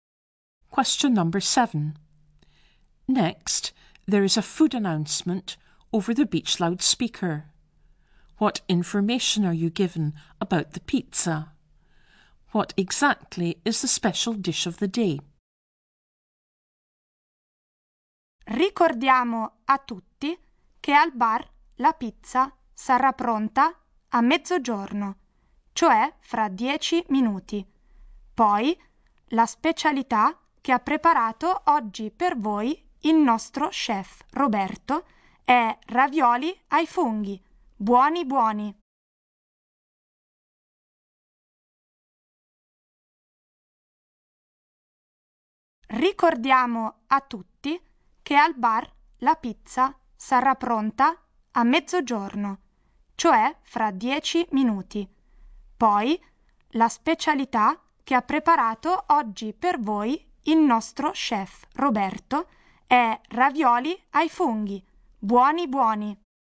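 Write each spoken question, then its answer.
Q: What information are you given about the pizza?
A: It will be ready at the bar at midday, in 10 minutes

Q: What exactly is the special dish of the day?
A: Mushroom ravioli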